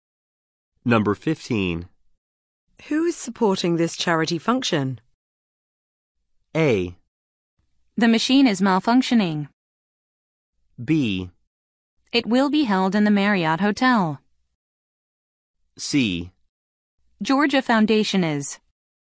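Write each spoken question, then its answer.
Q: Who is supporting this charity function?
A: C: Georgia Foundation is.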